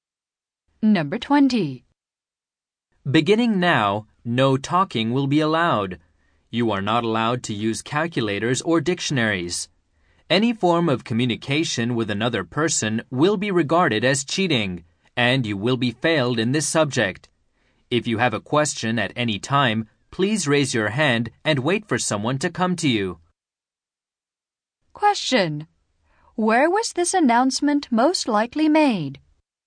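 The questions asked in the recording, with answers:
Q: Where was this announcement most likely made?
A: In an exam room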